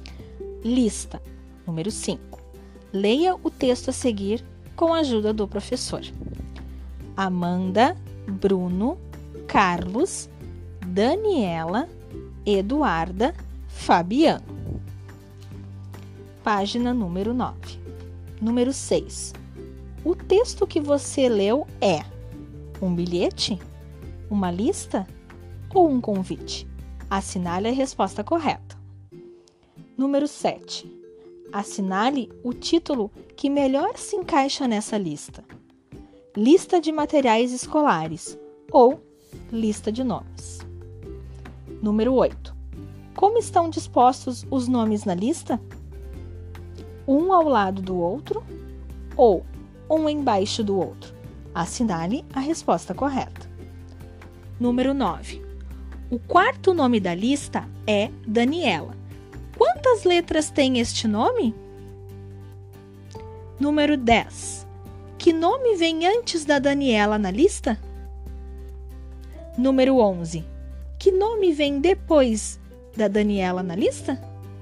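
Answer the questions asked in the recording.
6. Uma lista
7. Lista de nomes
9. 7 letras
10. Carlos
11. Eduarda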